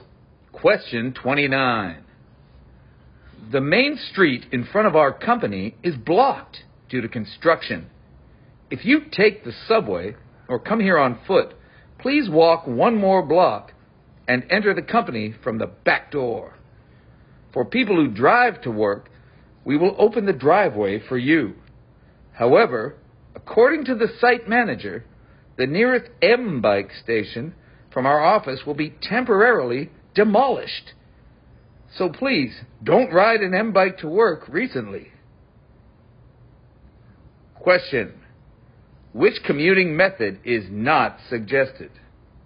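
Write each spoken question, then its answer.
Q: which commuting method is not suggested?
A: Riding an M bike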